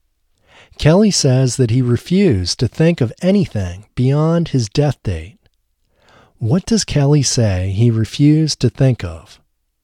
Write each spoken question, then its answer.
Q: What does Kelly say he refused to think of?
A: Kelly says he refused to think of anything beyond his death date.